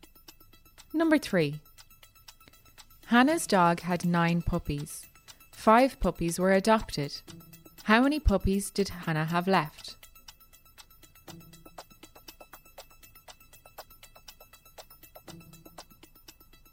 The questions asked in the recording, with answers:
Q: How many puppies did Hannah have left?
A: 4. 9 minus 5 is 4.